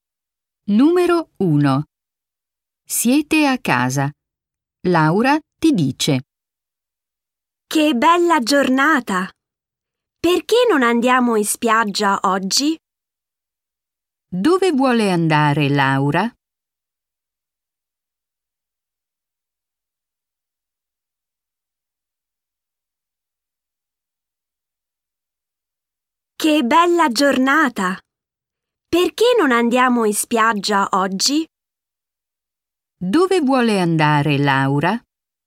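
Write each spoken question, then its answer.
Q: Dove vuole andare Laura?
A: In spiaggia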